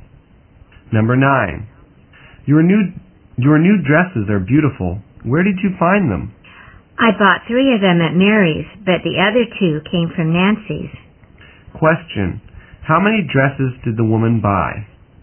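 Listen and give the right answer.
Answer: Five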